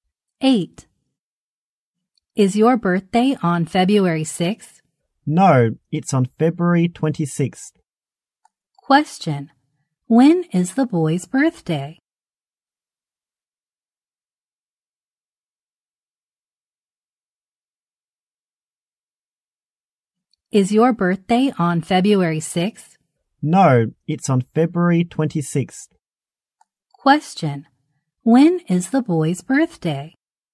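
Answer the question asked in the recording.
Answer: February 26th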